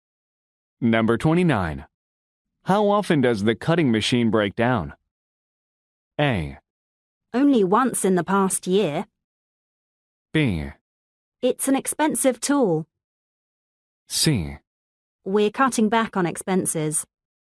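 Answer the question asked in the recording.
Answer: A: Only once in the past year.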